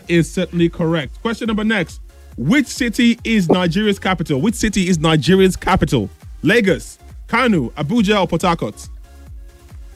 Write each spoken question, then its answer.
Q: Which city is Nigeria's capital?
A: Abuja,